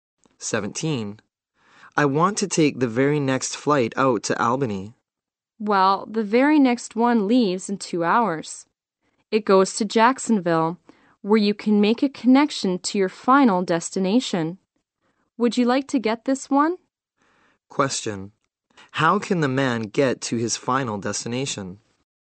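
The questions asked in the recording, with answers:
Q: How can the man get to his final destination?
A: By taking a flight to Jacksonville and changing planes there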